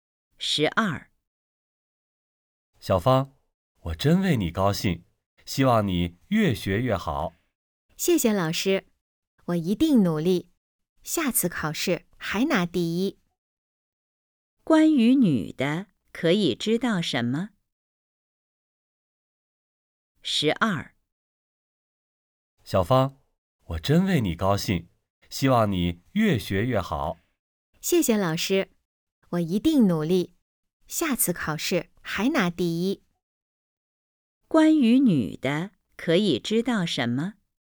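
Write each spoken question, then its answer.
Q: 关于女的,可以知道什么?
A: 她考试拿了第一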